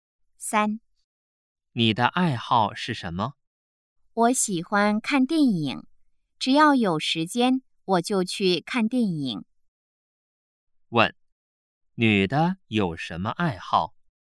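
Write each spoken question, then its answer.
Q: 问,女的有什么爱好?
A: 看电影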